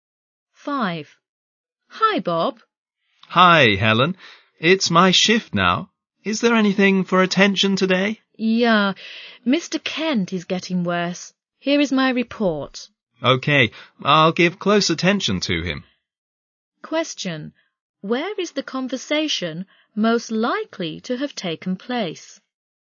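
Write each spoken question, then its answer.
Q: Where is the conversation most likely to have taken place?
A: In a hospital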